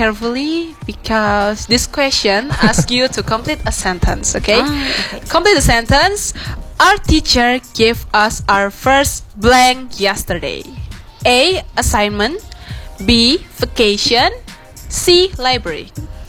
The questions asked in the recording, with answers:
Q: Complete the sentence. Our teacher gave us our first blank yesterday.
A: Okay, 1, 2, 3, A.